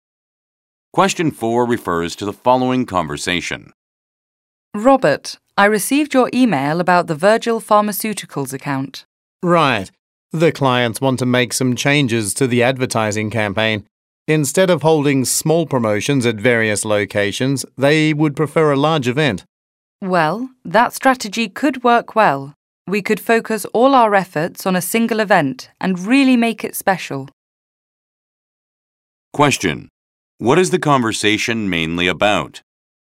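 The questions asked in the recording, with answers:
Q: What is the conversation mainly about?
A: Changes to a client's advertising campaign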